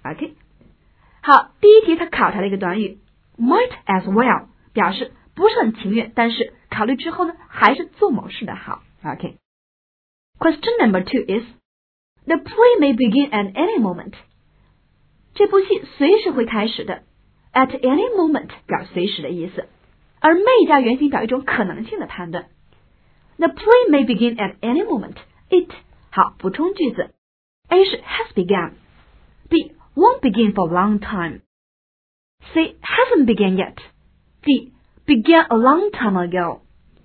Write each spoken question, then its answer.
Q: the play may begin at any moment, it, 好,补充句子。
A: 我们知道说这戏还没开始呢,答案应该是 C.